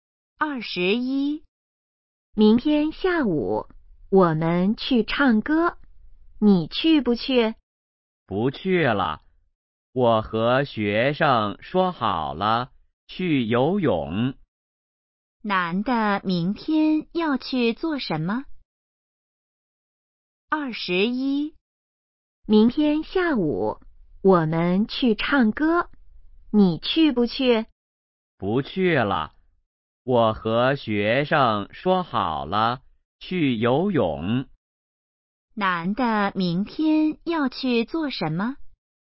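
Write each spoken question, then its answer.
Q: 男的明天要去做什么?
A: 去游泳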